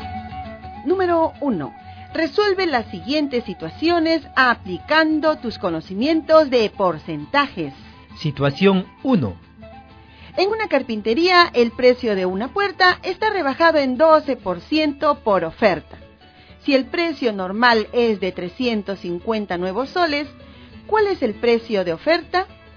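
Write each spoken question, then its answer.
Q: Si el precio normal es de 350 nuevos soles, ¿cuál es el precio de oferta?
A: 308 nuevos soles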